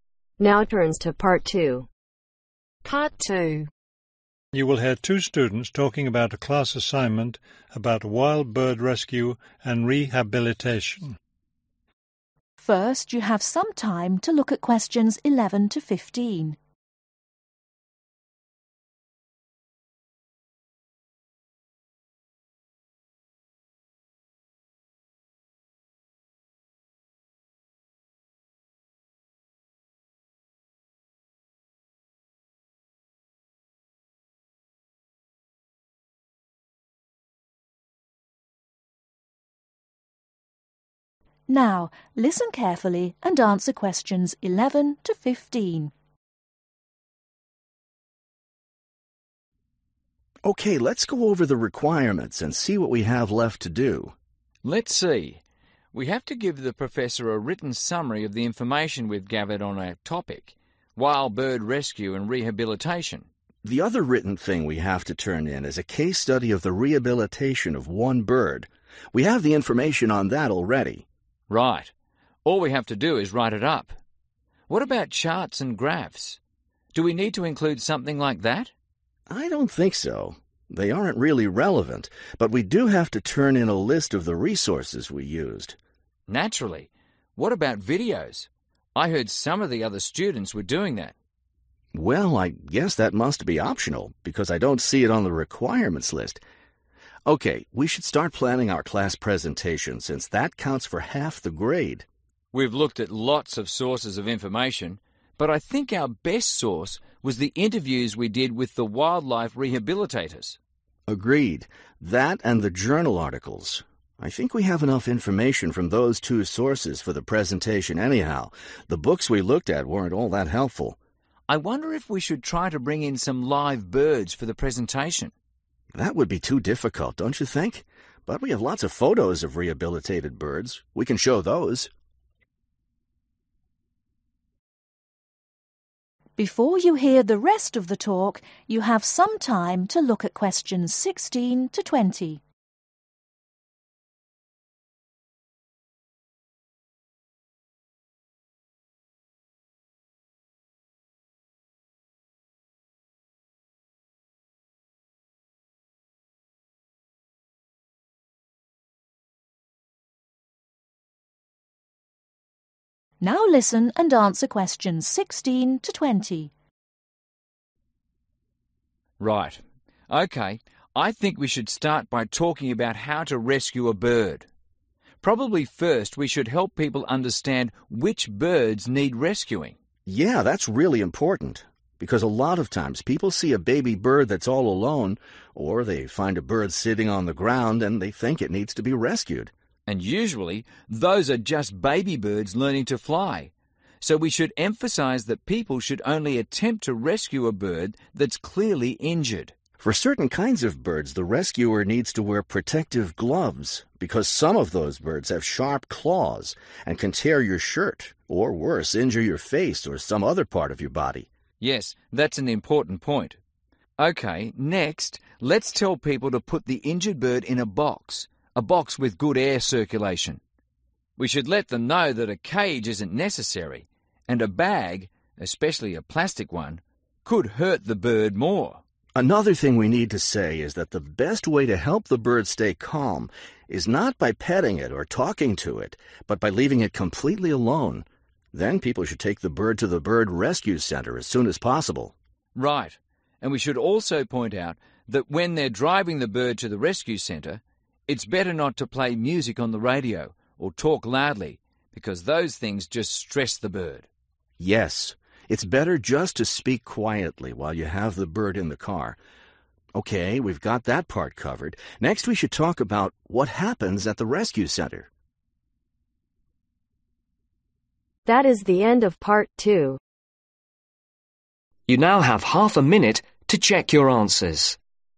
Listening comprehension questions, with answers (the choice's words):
Choose THREE letters , A-F.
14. What two sources of information will the student use when preparing their presentation ?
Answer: interviews, journal articles

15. What will the students show during their presentation ?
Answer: photos (of birds)

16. Only rescue birds that are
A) all alone.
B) obviously hurt.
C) sitting on the ground.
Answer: obviously hurt.

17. Protect your self by wearing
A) gloves.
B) a hat.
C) protective glasses.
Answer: gloves.

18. put the bird in a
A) cage.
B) box.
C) bag.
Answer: box.

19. Keep the bird calm by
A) petting it.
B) talking to it.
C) leaving it alone.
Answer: leaving it alone.

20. When transporting the bird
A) speak quietly.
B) play music.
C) drive very slowly.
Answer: speak quietly.